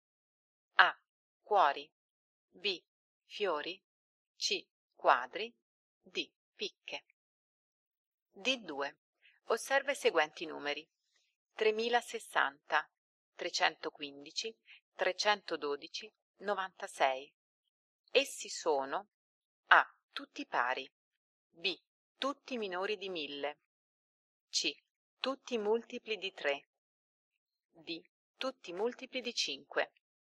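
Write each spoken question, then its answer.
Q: Osserva i seguenti numeri.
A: C: Tutti multipli di 3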